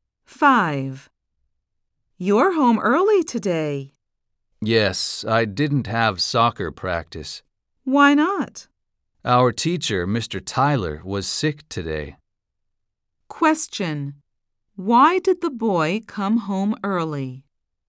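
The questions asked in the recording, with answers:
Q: Why did the boy come home early?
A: He didn't have soccer practice because Mr. Tyler was sick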